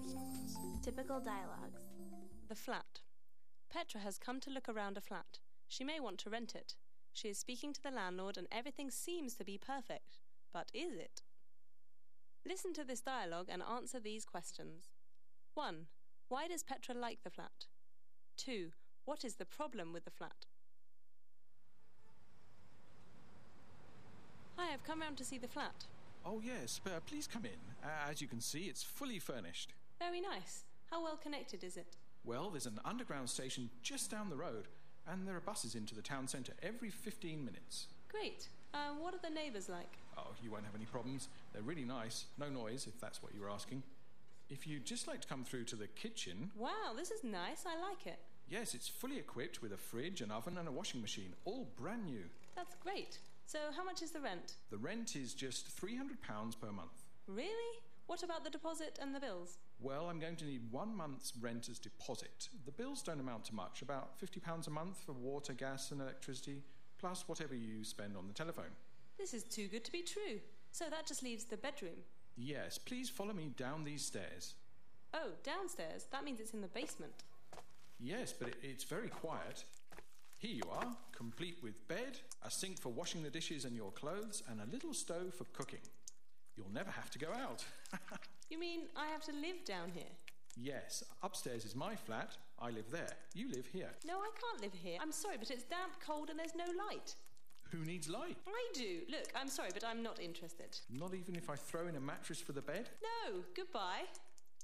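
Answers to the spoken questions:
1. It's furnished, well connected, quiet, has a new kitchen and the rent is cheap
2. She would live in the basement, which is damp, cold and has no light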